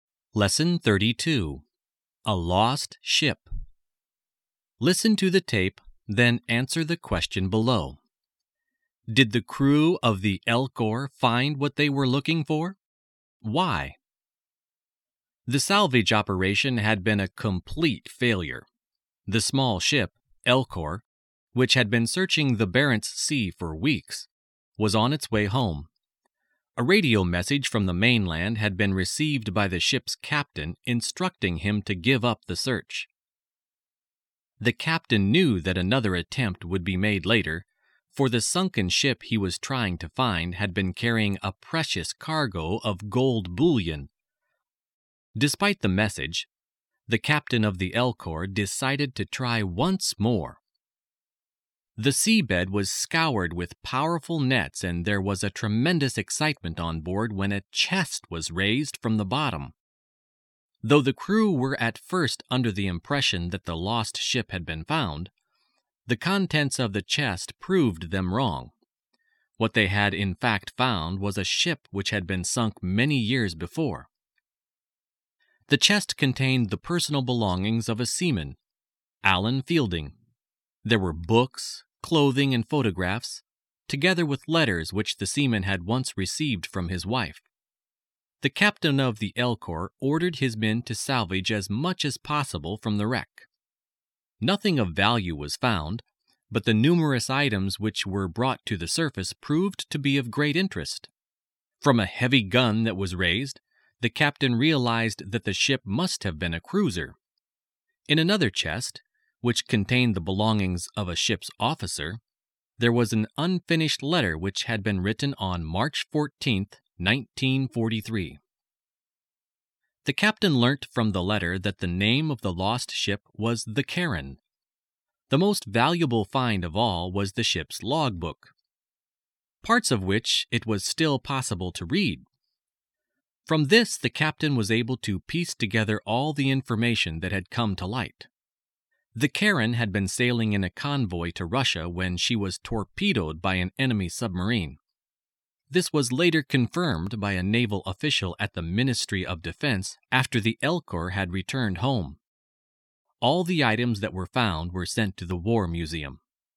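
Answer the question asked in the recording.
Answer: No, they found an old sunken cruiser, the Charon, not the ship with the gold.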